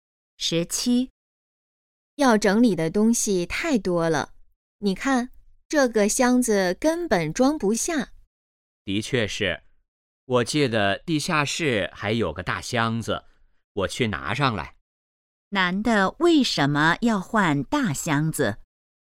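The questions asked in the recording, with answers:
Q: 男的为什么要换大箱子?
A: 东西太多,箱子装不下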